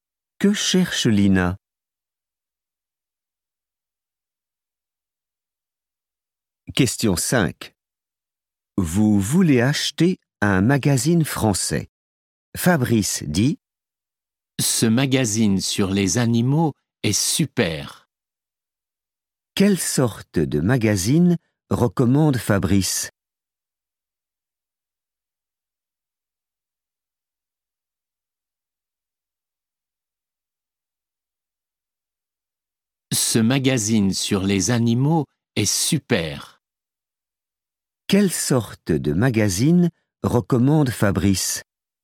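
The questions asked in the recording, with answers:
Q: Quelle sorte de magazine recommande Fabrice?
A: un magazine sur les animaux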